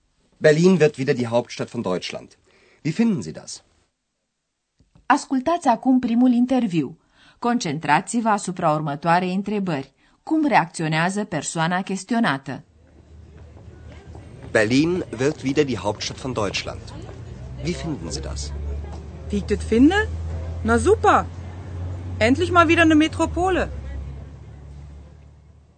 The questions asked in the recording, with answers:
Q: Cum reacționează persoana chestionată?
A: Persoana căreia îi se adresează Andreas își exprimă entuziasmul în pur dialect berlinez găsește grozav că Berlinul are devenit o metropolă.